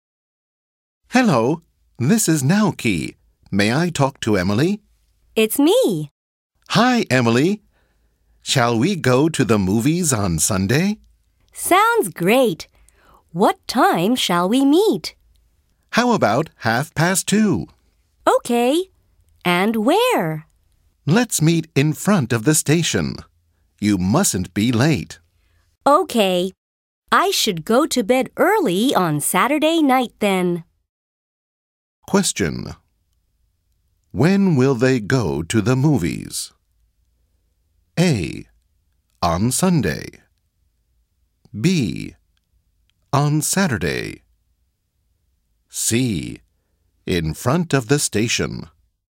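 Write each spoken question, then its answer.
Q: When will they go to the movies?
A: A: On Sunday.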